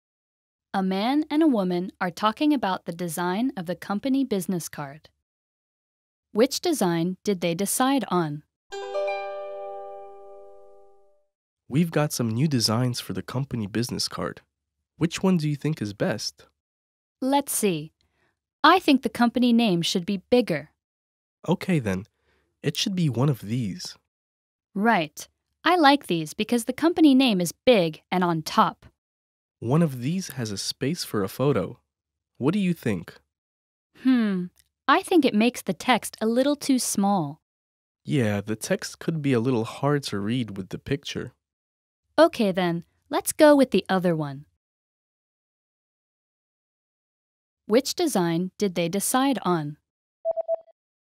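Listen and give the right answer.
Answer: The one with the big company name on top and no photo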